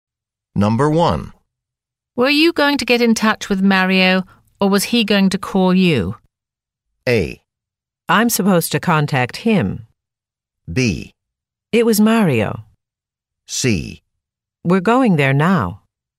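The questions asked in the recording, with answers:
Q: Were you going to get in touch with Mario, or was he going to call you?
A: A: I'm supposed to contact him.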